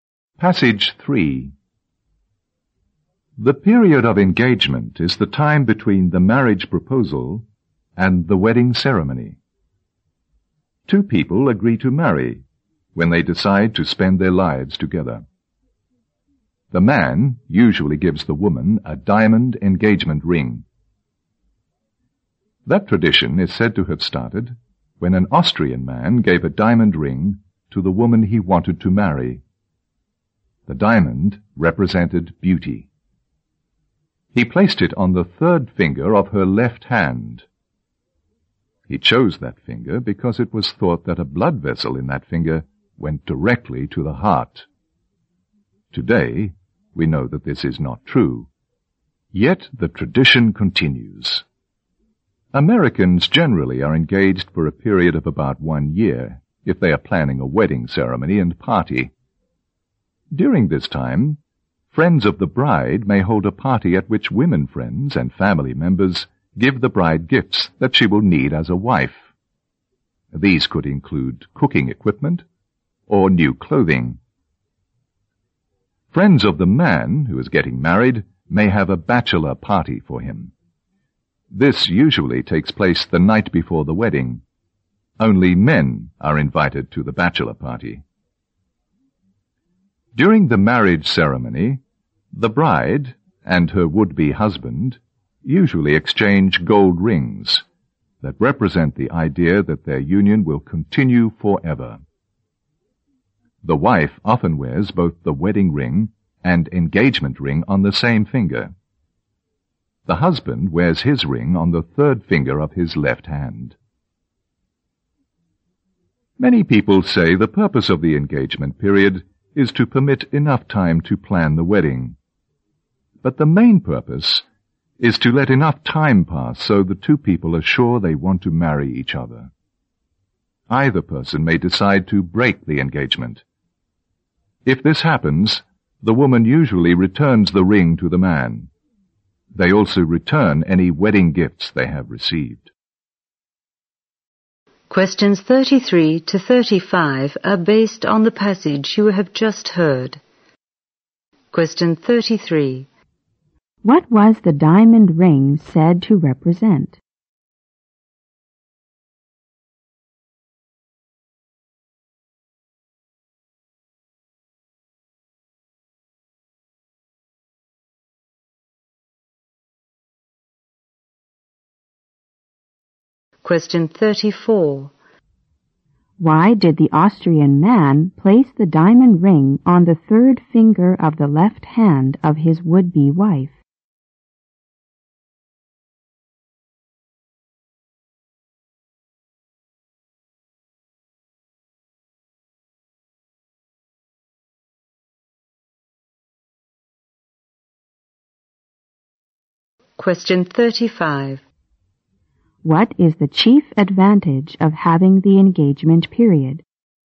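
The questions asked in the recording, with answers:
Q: What was the diamond ring said to represent?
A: Beauty

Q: Why did the Austrian man place the diamond ring on the third finger of the left hand of his would-be wife?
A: He thought a blood vessel in that finger went directly to the heart

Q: What is the chief advantage of having the engagement period?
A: It gives the couple time to be sure they want to marry each other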